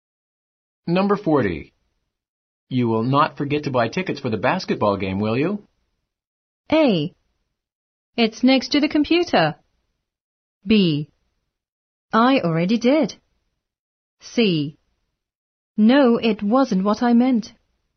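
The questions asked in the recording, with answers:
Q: You will not forget to buy tickets for the basketball game, will you?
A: B: I already did.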